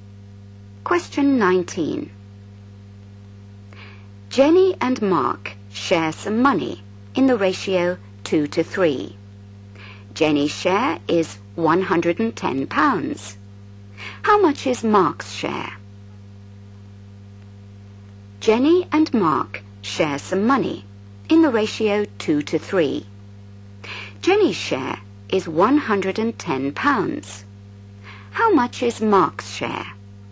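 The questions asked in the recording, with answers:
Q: Jenny's share is £110. How much is Mark's share?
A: £165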